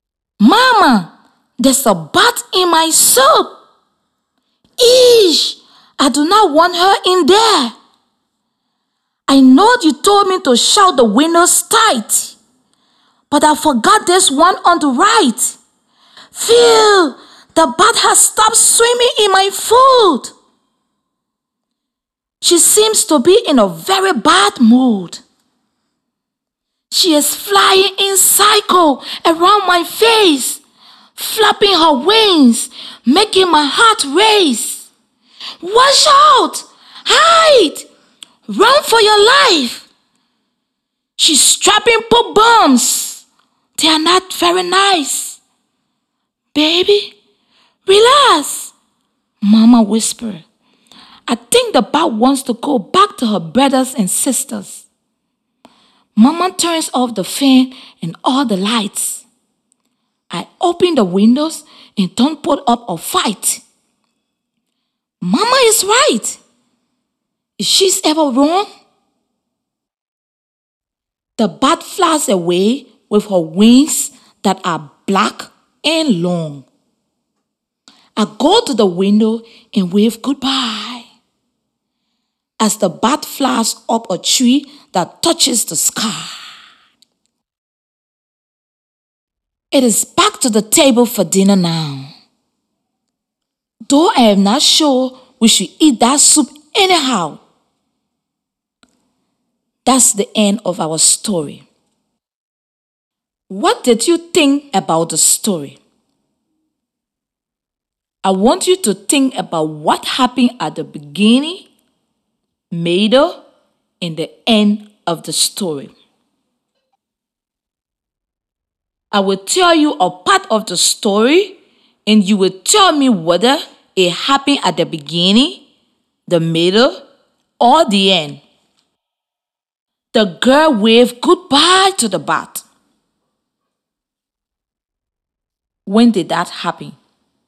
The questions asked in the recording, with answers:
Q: The girl waved goodbye to the bat. When did that happen?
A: At the end of the story,